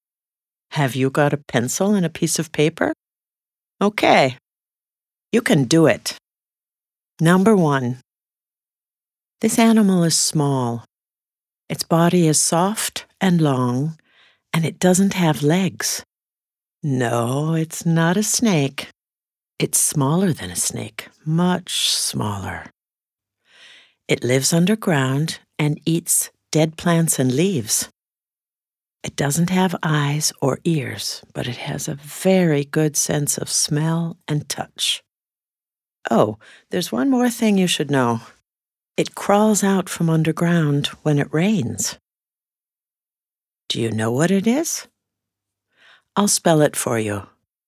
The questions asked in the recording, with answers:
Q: Do you know what it is?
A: W-O-R-M.